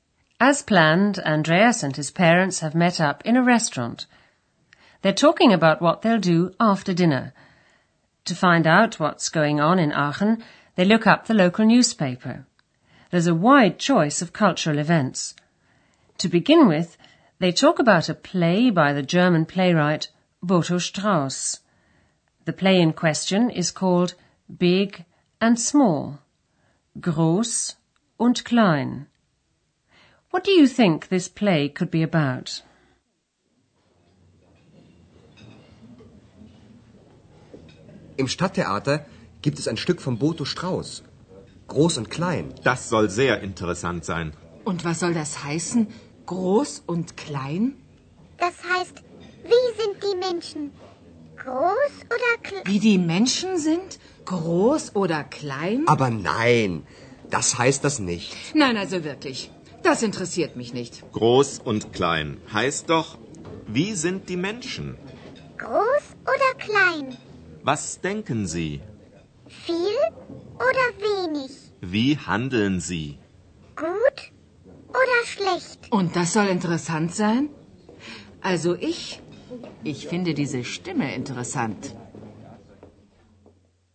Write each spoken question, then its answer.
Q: What do you think this play could be about?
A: Herr Schäfer thinks that the title of the play, Big and Small, refers to people's characters.